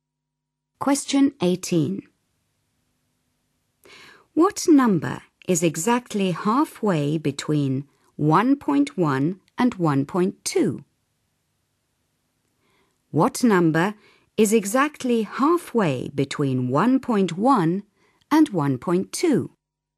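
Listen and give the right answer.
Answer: 1.15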